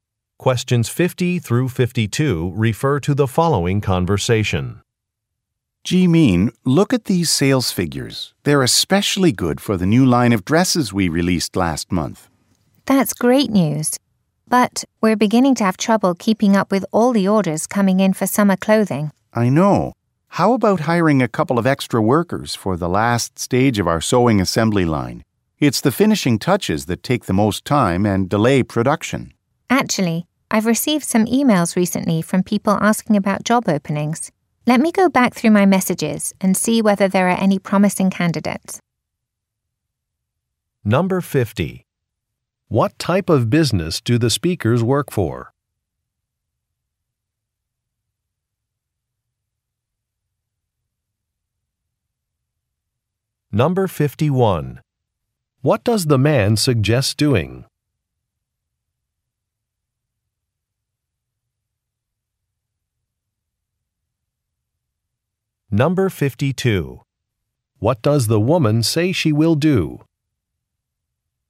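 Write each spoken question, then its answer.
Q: What type of business do the speakers work for?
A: A clothing manufacturer

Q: What does the man suggest doing?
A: Hiring extra workers

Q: What does the woman say she will do?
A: Check her emails for job candidates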